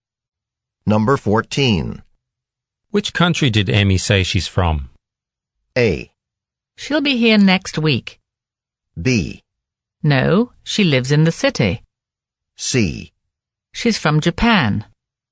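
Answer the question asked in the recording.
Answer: C: She's from Japan.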